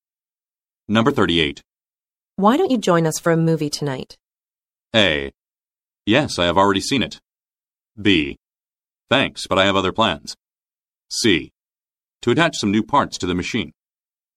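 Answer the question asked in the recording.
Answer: B: Thanks, but I have other plans.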